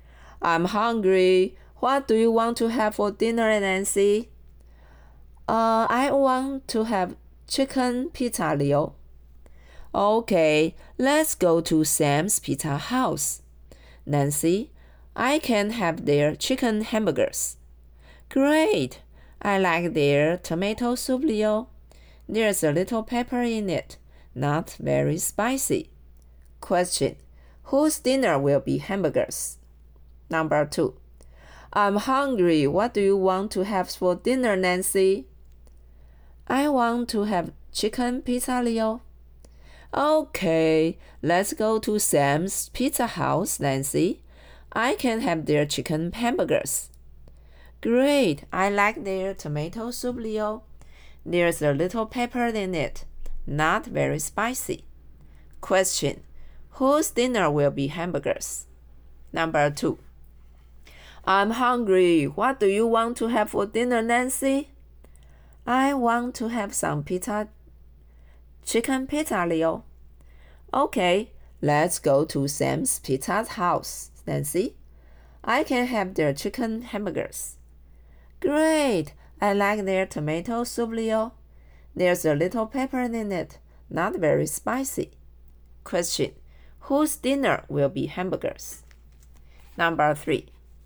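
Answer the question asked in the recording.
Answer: Leo's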